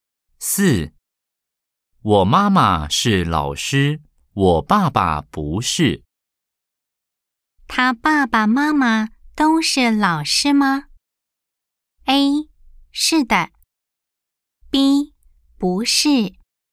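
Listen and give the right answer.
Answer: B: 不是。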